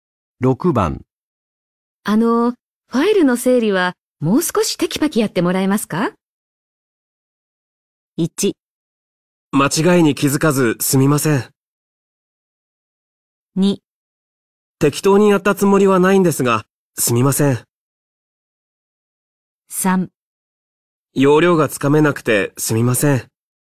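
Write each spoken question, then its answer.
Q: あの、ファイルの整理はもう少しテキパキやってもらえますか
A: 3: 要領がつかめなくてすみません。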